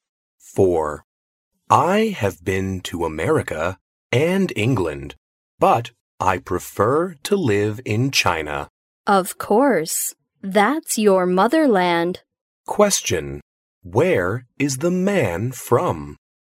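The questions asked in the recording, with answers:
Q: Where is the man from?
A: China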